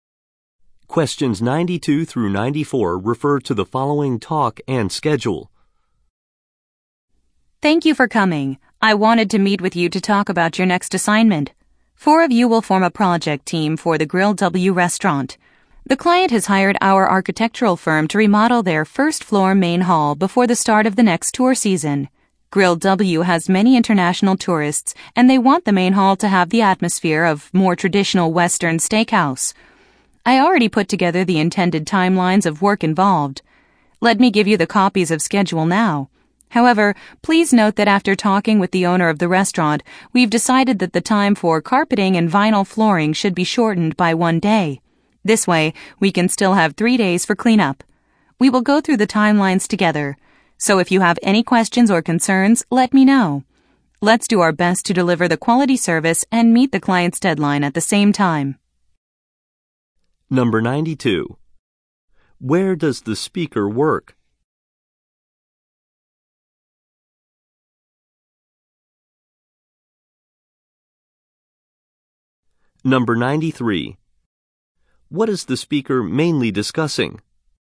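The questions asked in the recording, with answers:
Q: Where does the speaker work?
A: At an architectural firm

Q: What is the speaker mainly discussing?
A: A new project to remodel a restaurant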